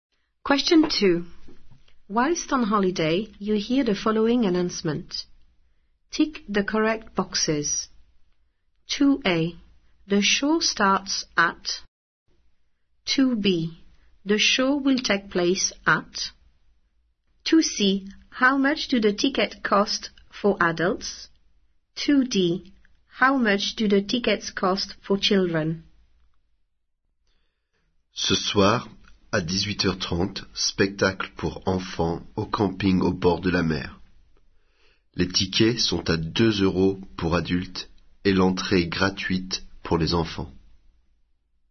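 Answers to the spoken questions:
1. 18:30
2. the campsite by the sea
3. 2 euros
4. free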